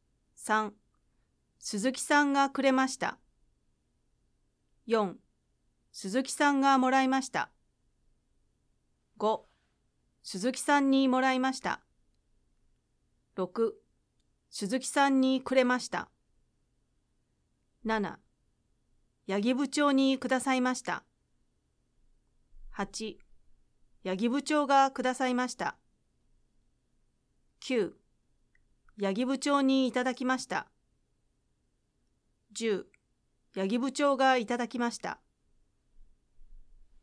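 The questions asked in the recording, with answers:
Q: 鈴木さんがくれました。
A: 話し手

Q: 鈴木さんがもらいました。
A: 鈴木さん

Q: 鈴木さんにもらいました。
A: 話し手

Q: 鈴木さんにくれました。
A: 鈴木さん

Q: 八木部長がくださいました。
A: 話し手

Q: 八木部長にいただきました。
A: 話し手

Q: 八木部長がいただきました。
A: 八木部長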